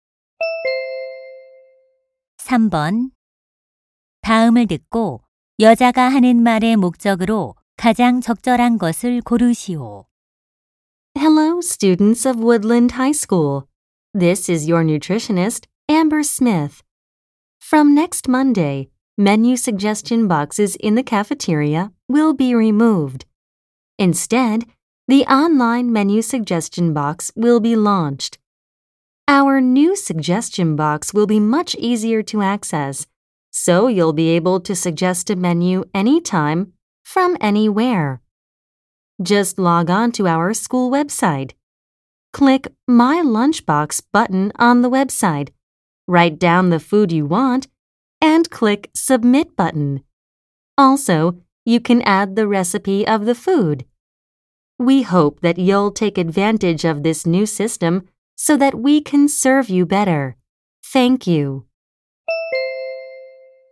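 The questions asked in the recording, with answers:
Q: 다음을 듣고 여자가 하는 말의 목적으로 가장 적절한 것을 고르시오.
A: 온라인 메뉴 건의함 개설을 안내하려고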